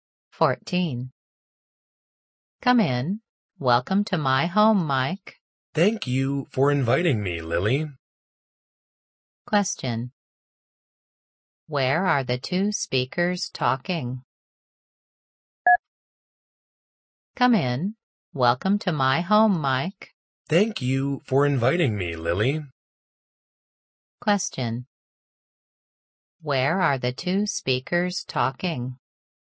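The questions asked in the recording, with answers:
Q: Where are the two speakers talking?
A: At Lily's home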